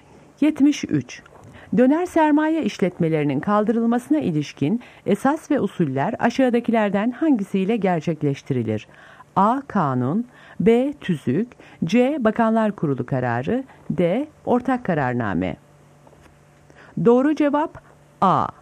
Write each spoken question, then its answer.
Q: Döner sermaye işletmelerinin kaldırılmasına ilişkin esas ve usuller aşağıdakilerden hangisiyle gerçekleştirilir?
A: Doğru cevap A.